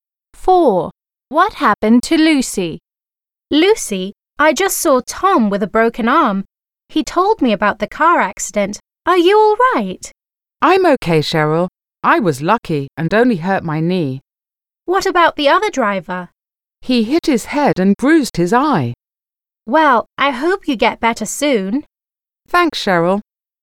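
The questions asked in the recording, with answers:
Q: What happened to Lucy?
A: She hurt her knee in a car accident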